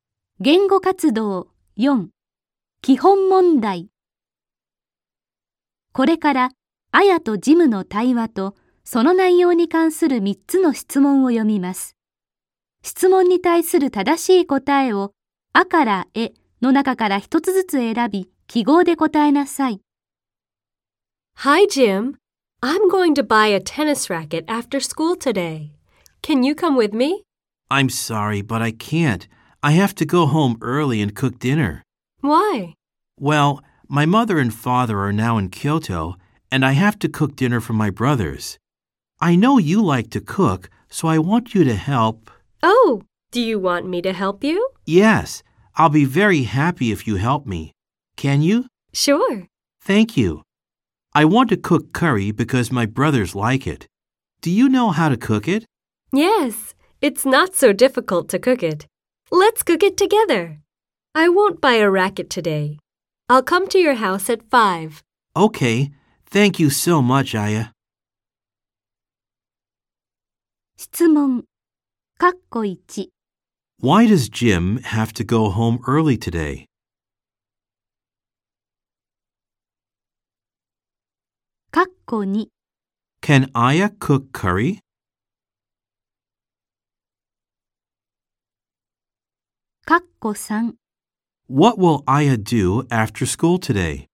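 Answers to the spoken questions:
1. Because he has to cook dinner for his brothers.
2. Yes, she can.
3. She will go to Jim's house and cook curry with him.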